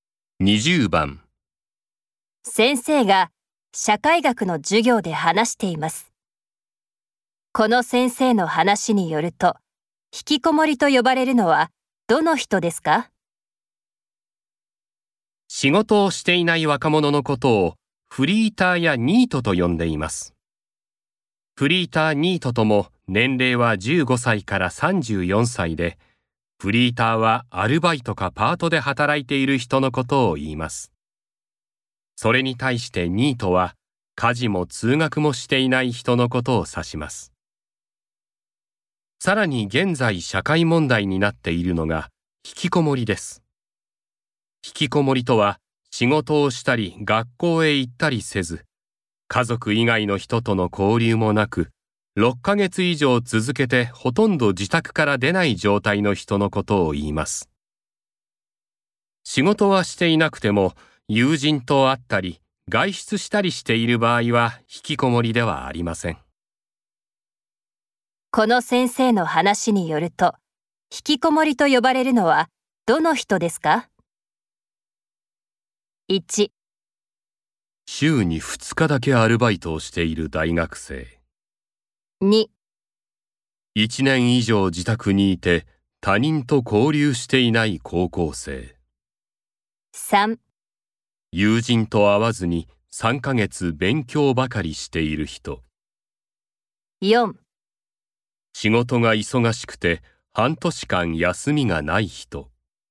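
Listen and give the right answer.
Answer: 2: 1年以上自宅にいて他人と交流していない高校生。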